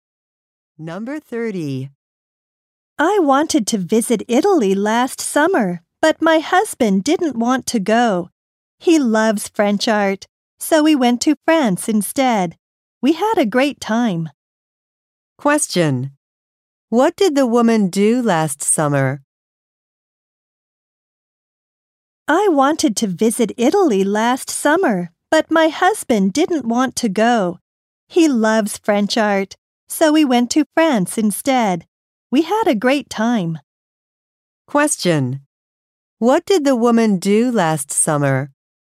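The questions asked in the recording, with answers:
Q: What did the woman do last summer?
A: She went to France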